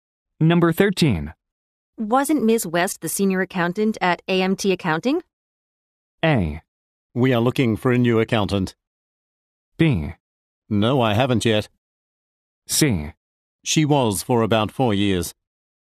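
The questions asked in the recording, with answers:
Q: Wasn't Ms. West the senior accountant at AMT Accounting?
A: C: She was for about four years.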